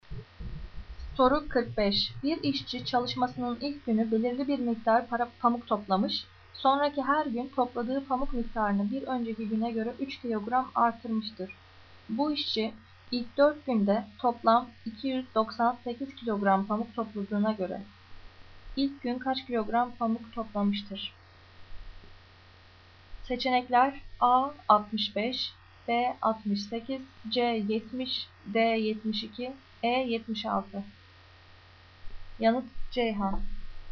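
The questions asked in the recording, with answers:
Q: Bu işçi ilk 4 günde toplam 298 kilogram pamuk topladığına göre ilk gün kaç kilogram pamuk toplamıştır?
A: C: 70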